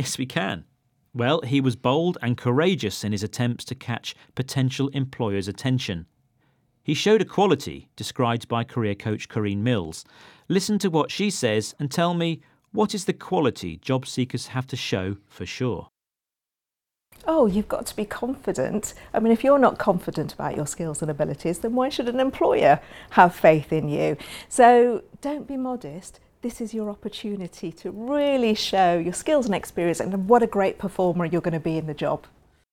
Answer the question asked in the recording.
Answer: The career coach says you've got to be confident.